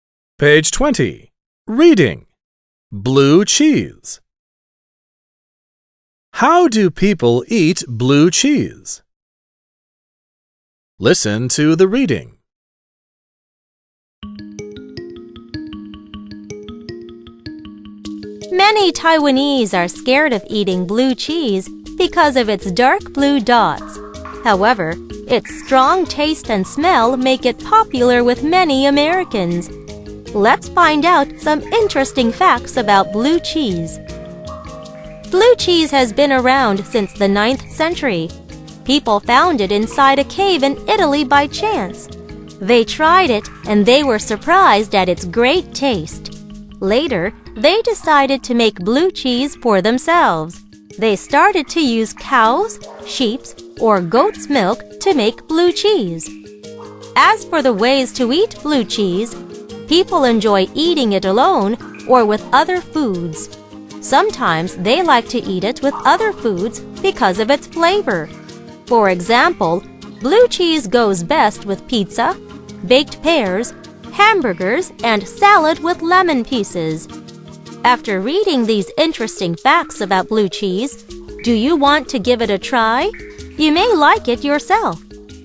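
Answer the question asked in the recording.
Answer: Alone or with other foods (e.g. pizza, baked pears, hamburgers, salad)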